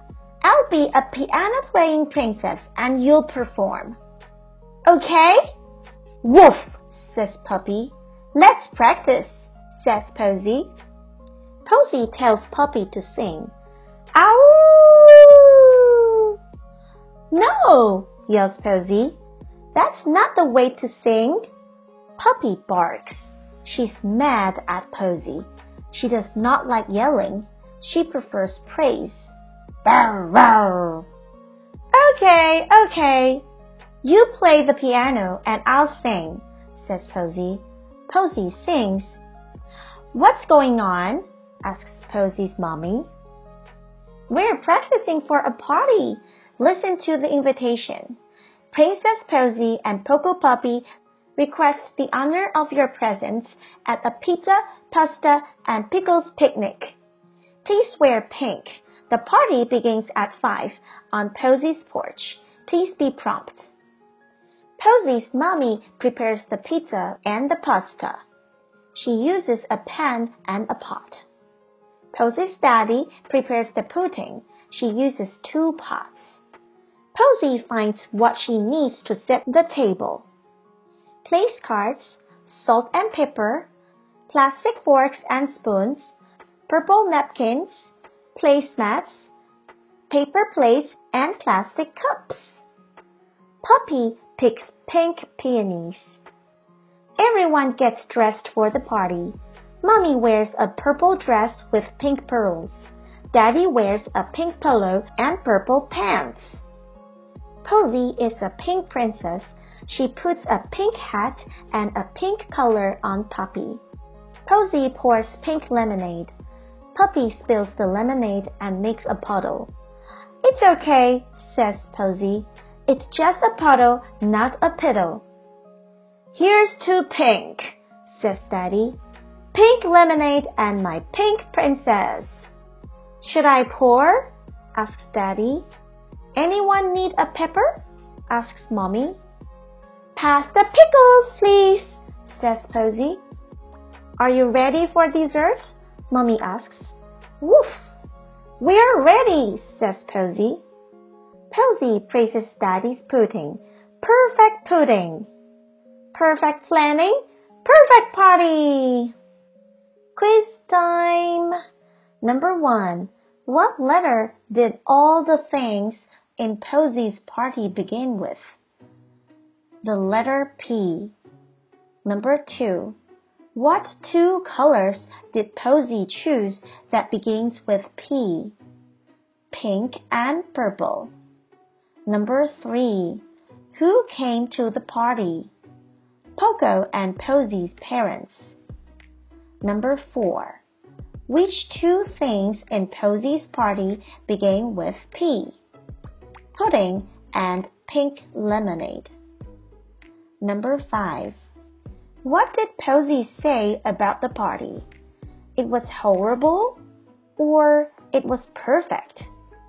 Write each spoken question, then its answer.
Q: What did Posey say about the party? It was horrible or it was perfect?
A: The answer is it was perfect.